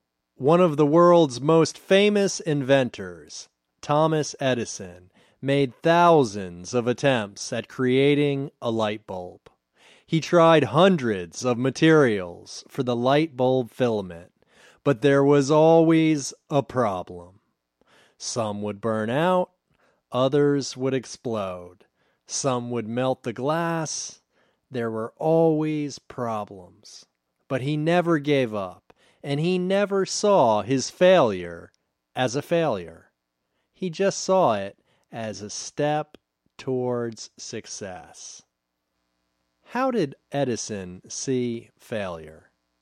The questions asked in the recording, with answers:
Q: How did Edison see failure?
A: He saw failure as a step towards success.